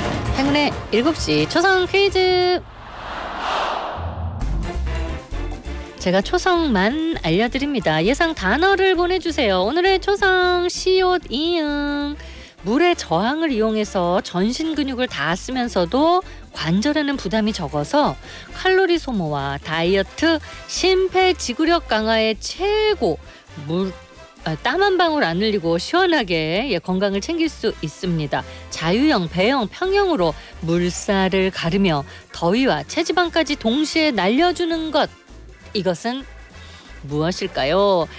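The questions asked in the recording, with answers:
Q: 자유형, 배형, 평형으로 물살을 가르며 더위와 체지방까지 동시에 날려주는 것, 이것은 무엇일까요?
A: 수영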